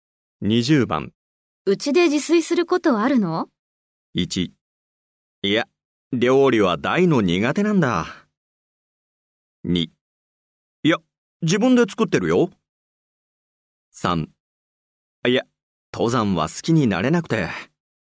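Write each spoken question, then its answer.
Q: うちで自炊することあるの?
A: 1: いや、料理は大の苦手なんだ。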